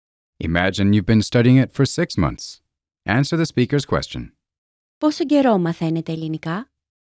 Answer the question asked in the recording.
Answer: Για 6 μήνες.